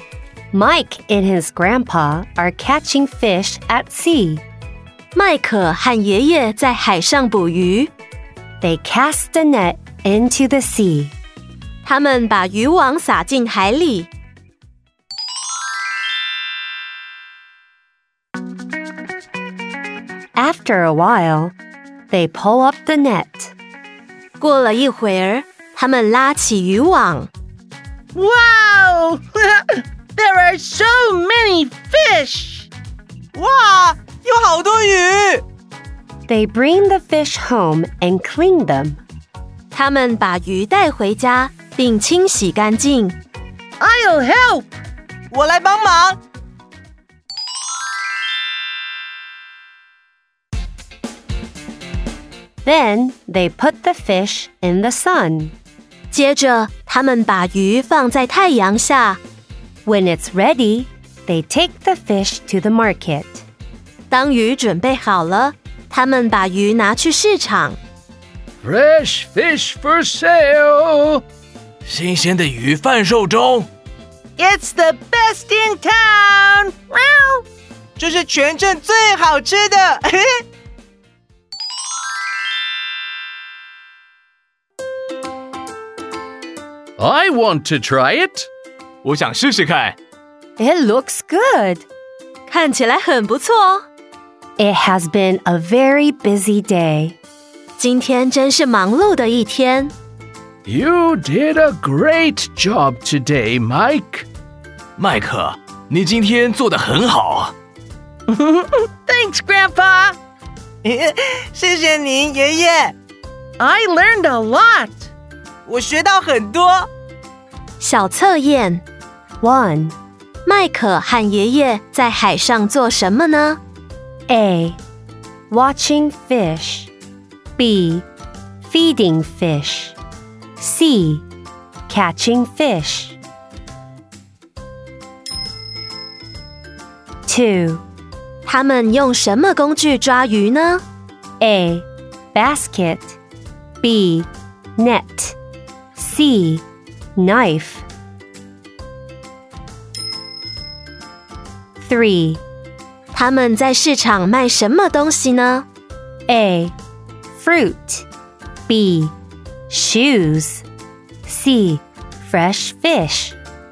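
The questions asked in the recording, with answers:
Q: 麦克和爷爷在海上做什么呢?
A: C: Catching fish.

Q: 他们用什么工具抓鱼呢?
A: B: Net.

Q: 他们在市场卖什么东西呢?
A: C: Fresh fish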